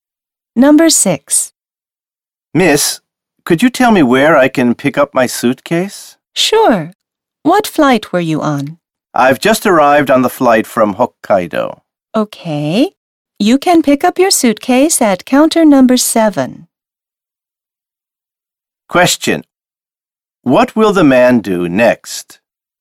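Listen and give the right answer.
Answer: Go to counter number 7 to pick up his suitcase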